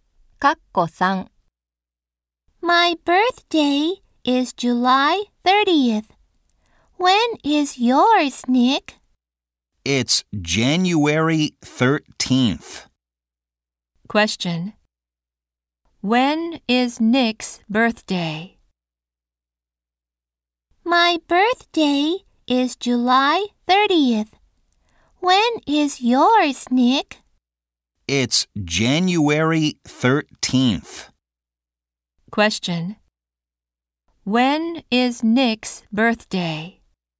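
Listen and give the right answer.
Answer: January 13th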